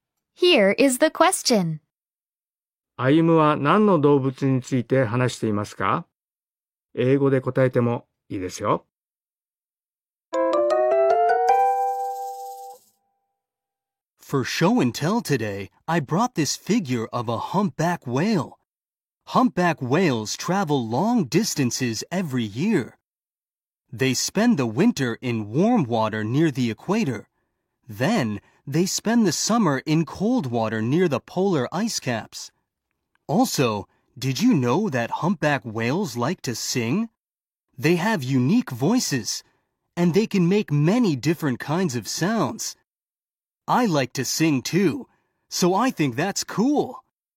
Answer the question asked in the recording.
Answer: 答えは、ザトウクジラ、あるいはクジラでもいいですよ。